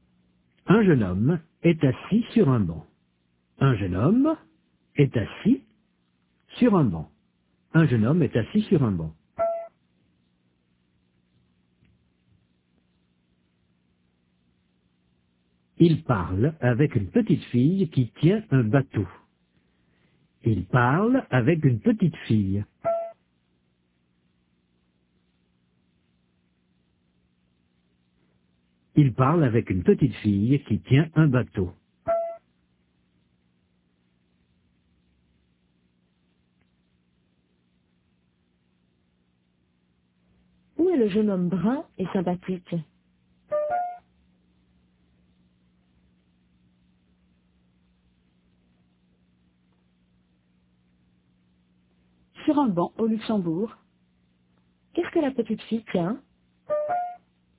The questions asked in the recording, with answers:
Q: Qu'est-ce que la petite fille tient?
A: Un bateau.